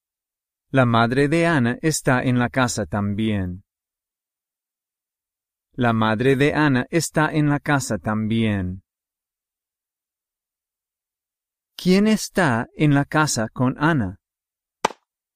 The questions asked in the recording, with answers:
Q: ¿Quién está en la casa con Anna?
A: Su madre.